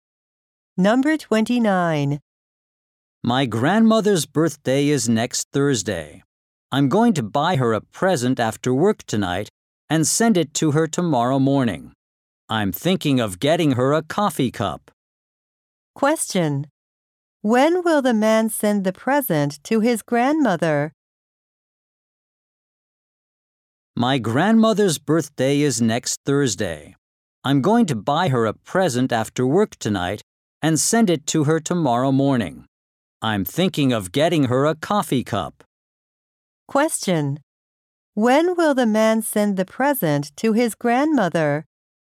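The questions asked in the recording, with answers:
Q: When will the man send the present to his grandmother?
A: Tomorrow morning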